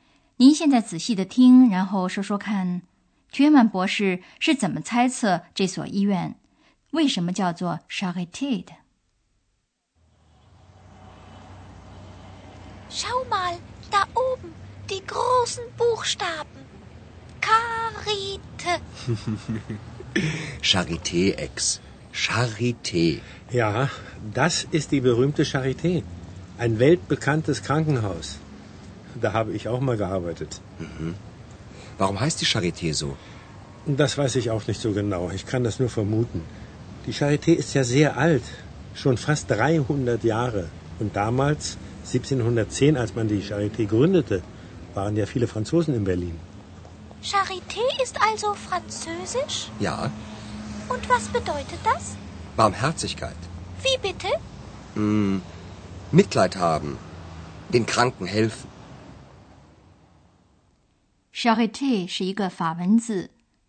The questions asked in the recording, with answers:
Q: 您现在仔细的听,然后说说看 Thürmann 博士是怎么猜测这所医院为什么叫做 Charité 的?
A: 差不多在300年前建这所医院的时候,柏林有许多法国流亡者,所以大概是由于这个原因,人们给这所医院取了一个法国名字。